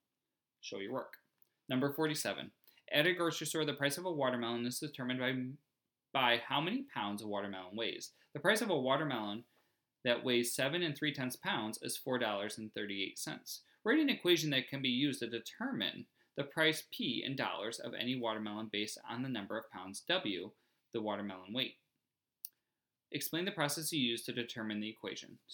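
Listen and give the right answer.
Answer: P = 0.6W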